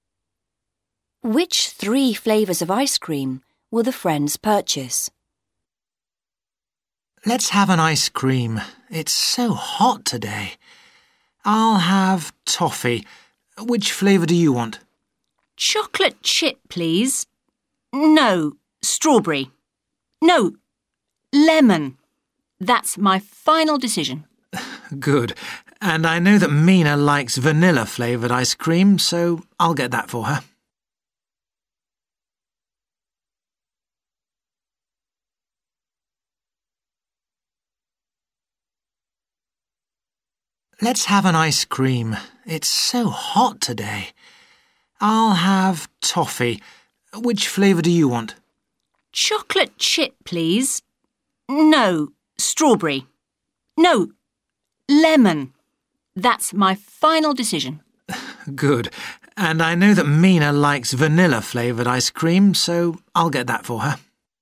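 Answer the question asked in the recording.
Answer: Toffee, lemon and vanilla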